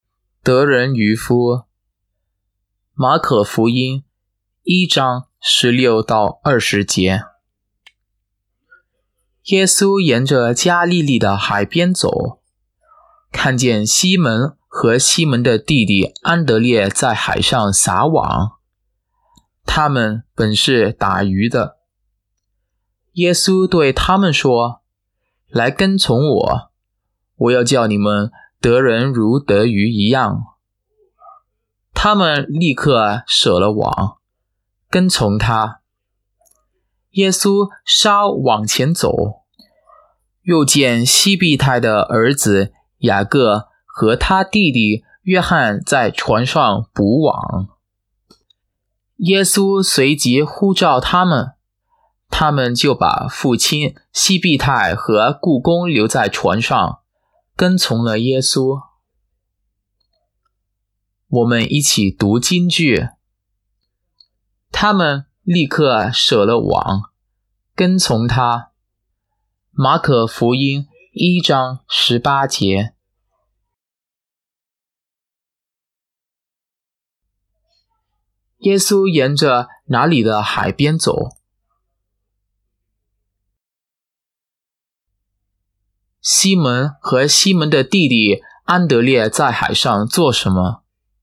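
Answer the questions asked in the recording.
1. 加利利
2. 撒网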